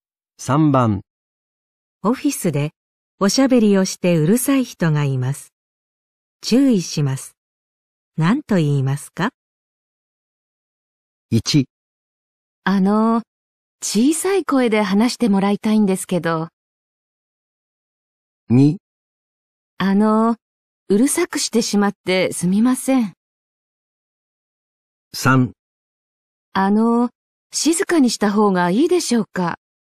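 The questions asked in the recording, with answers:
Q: 何と言いますか?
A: 1: 小さい声で話してもらいたいんですけど。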